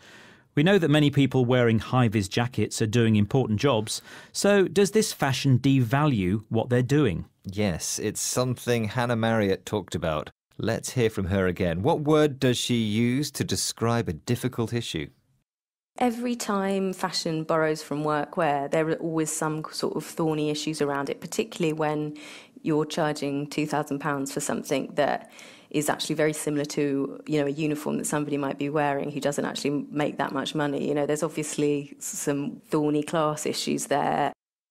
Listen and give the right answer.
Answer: So she used the word thorny to describe the issue